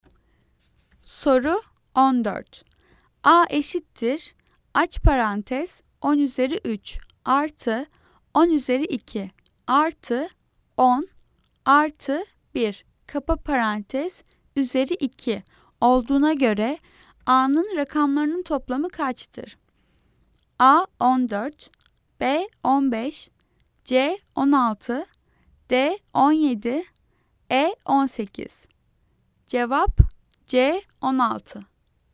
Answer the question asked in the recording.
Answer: Cevap C 16.